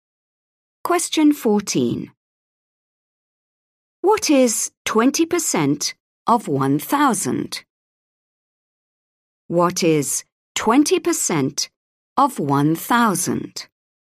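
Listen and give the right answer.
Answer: 200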